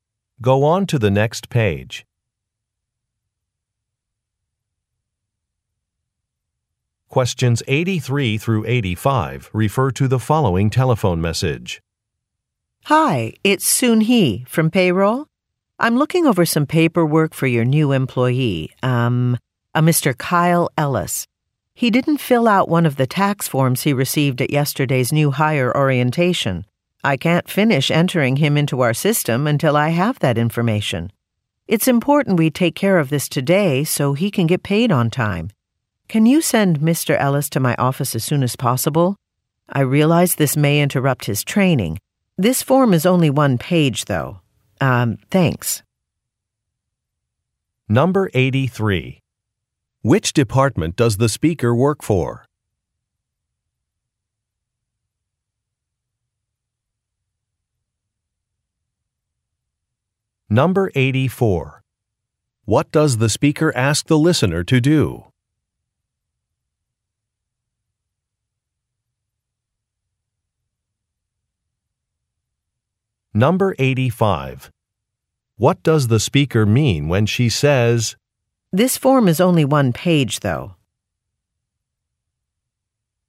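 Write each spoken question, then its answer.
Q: Which department does the speaker work for?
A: Payroll

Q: What does the speaker ask the listener to do?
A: Send Mr. Ellis to her office as soon as possible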